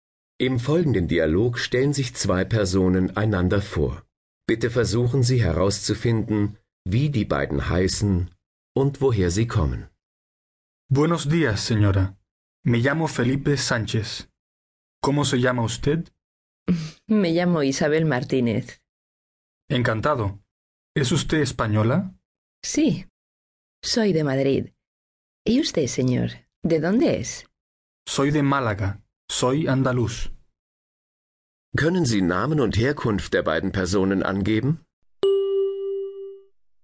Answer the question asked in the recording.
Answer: Es sind Isabel Martinez aus Madrid und Felipe Sanchez aus Malaga.